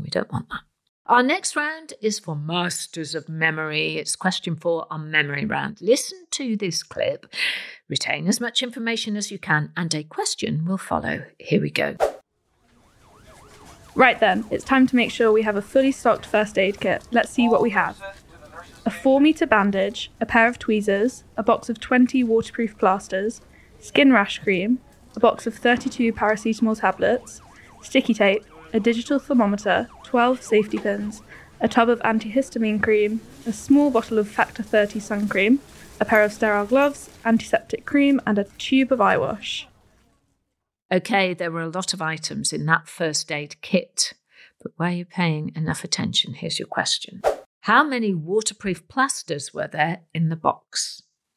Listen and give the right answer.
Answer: Well, there were 20 waterproof plasters in the box, so well done if you remembered that.